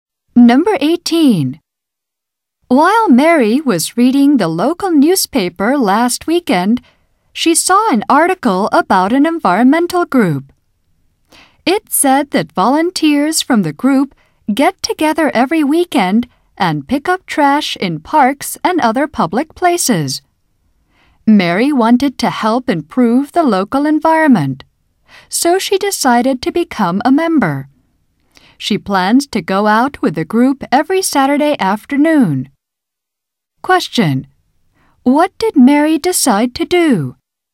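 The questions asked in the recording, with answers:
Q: What did Mary decide to do?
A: Join an environmental group that picks up trash in public places.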